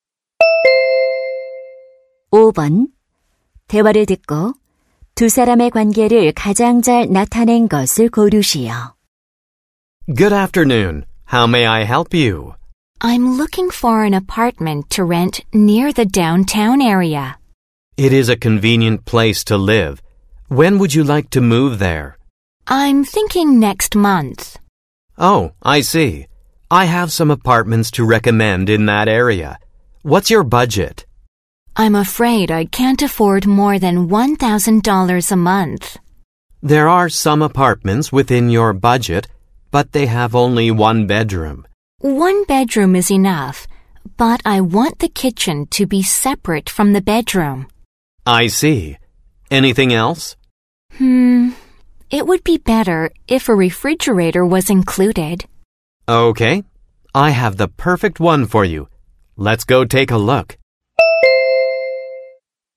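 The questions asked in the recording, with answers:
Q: 대화를 듣고 두 사람의 관계를 가장 잘 나타낸 것을 고르시오.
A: 부동산 중개인 - 고객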